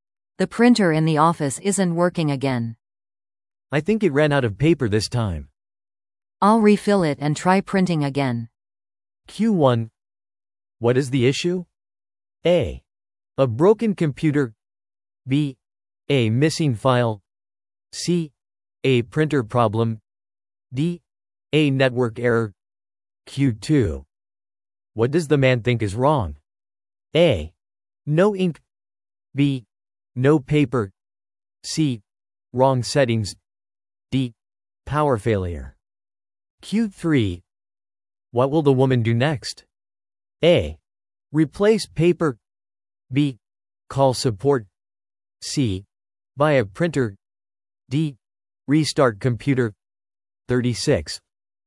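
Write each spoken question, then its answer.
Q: What is the issue?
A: C: A printer problem.

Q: What does the man think is wrong?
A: B: No paper.

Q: What will the woman do next?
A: A: Replace paper.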